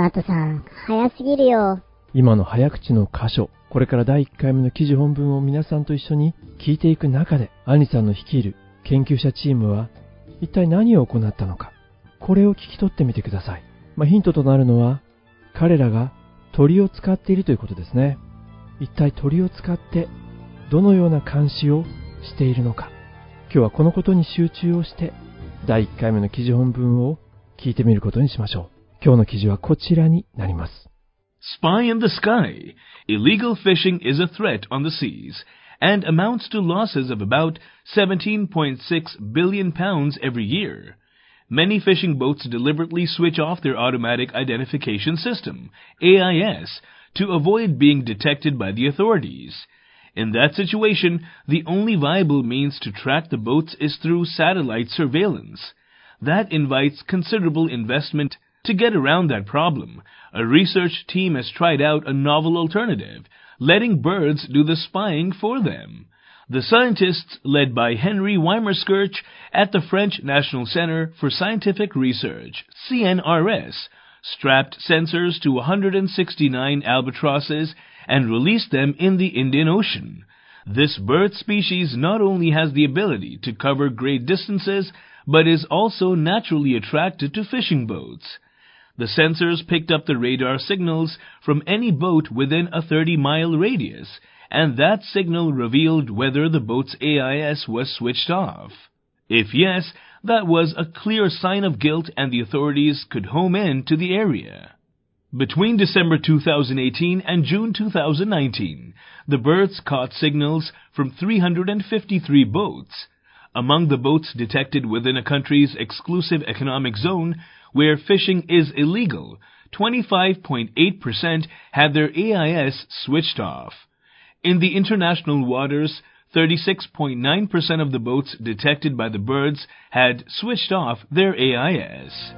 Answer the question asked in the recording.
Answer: The scientists led by Henry Weimerskirch at the French National Center for Scientific Research, CNRS, strapped sensors to 169 albatrosses and released them in the Indian Ocean.